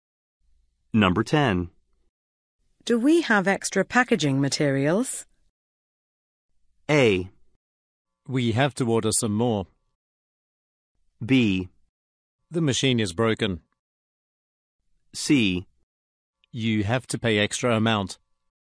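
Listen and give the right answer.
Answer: A: We have to order some more.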